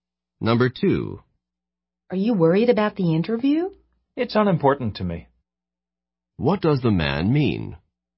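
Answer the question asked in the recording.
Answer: He isn't worried about the interview.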